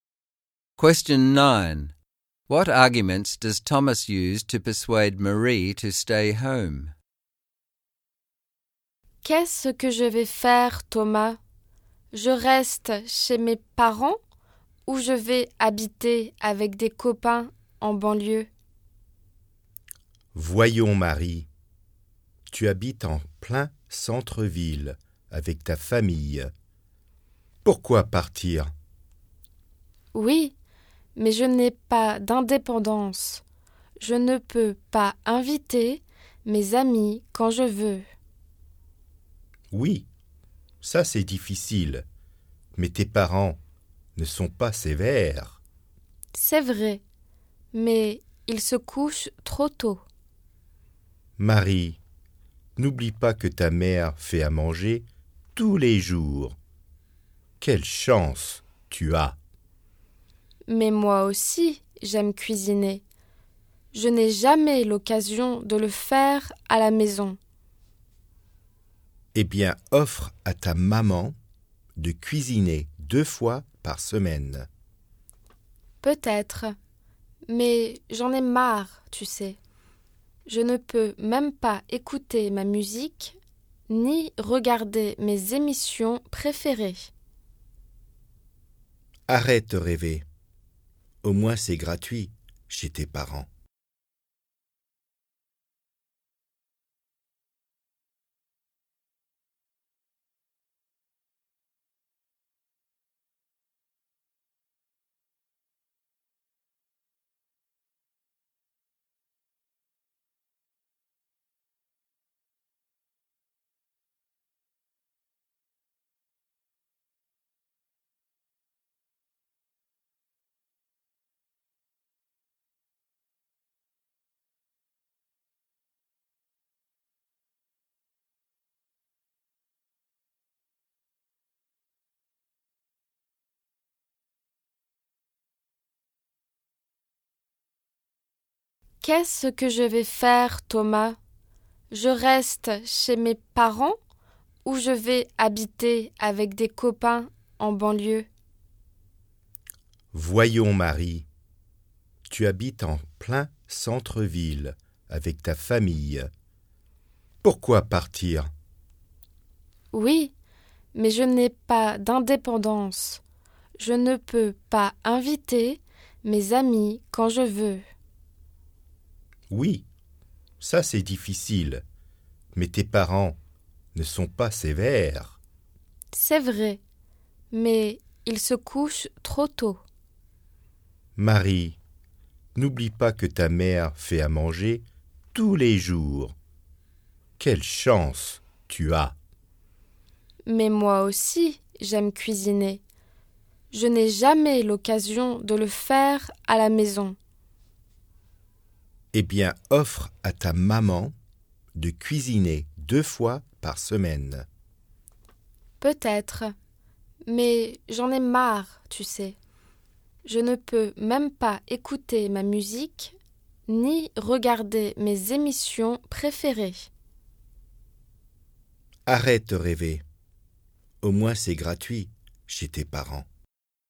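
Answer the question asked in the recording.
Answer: She lives in the city centre, her parents aren't strict, her mother cooks every day, and living with her parents is free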